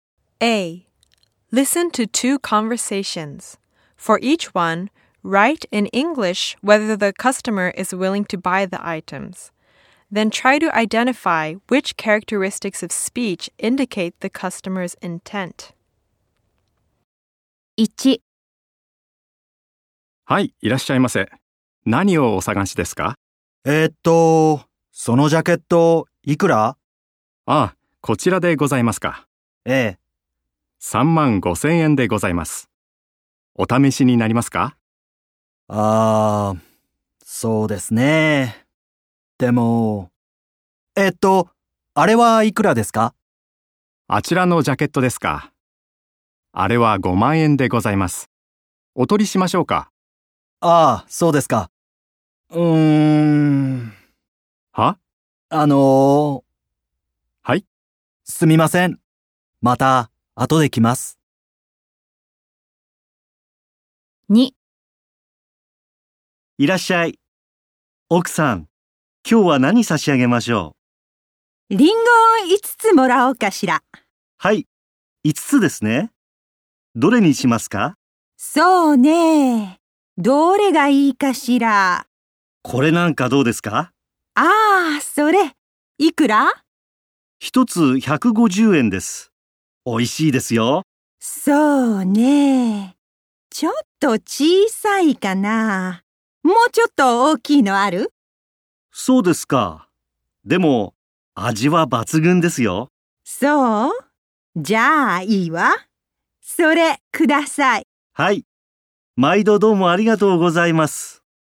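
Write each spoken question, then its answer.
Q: For each one, write in English whether the customer is willing to buy the items.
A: No, the customer is not willing to buy; they say they will come back later.

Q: For each one, write in English whether the customer is willing to buy the items.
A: Yes, the customer buys the apples.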